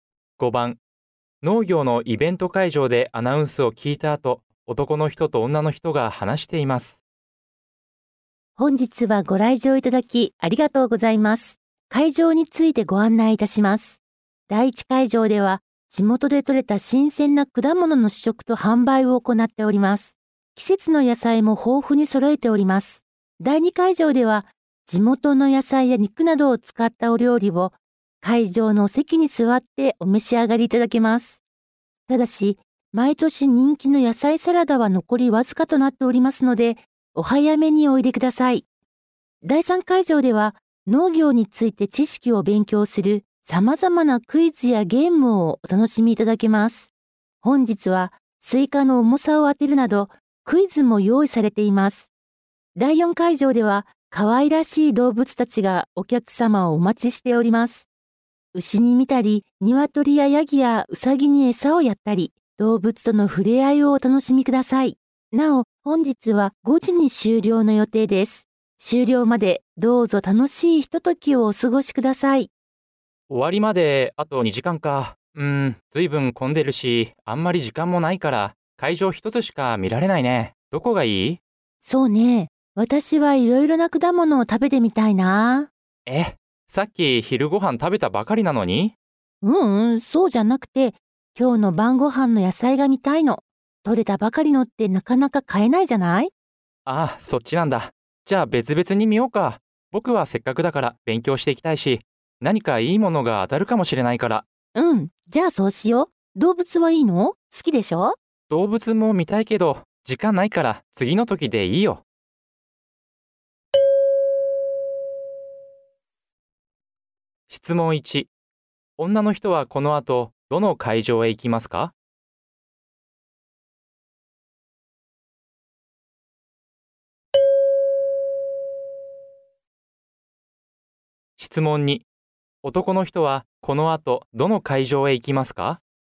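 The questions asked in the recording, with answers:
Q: 女の人はこの後どの会場へ行きますか?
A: 第一会場

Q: 男の人はこの後どの会場へ行きますか?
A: 第3会場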